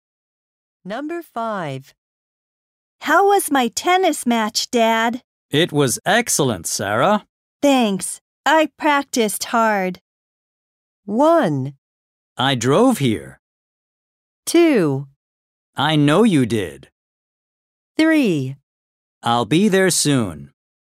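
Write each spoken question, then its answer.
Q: Thanks. I practiced hard.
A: 2: I know you did.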